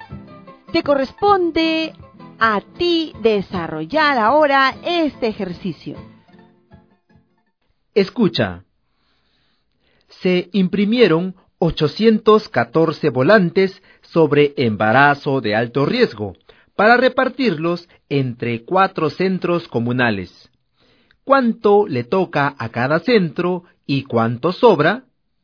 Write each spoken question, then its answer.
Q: ¿Cuánto le toca a cada centro y cuánto sobra?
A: Le toca 203 volantes. ¿Y cuánto sobra? Sobran 2 volantes.